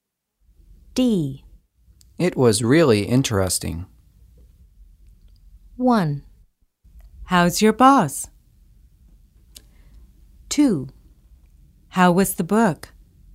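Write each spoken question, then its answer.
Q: It was really interesting.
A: 2: How was the book?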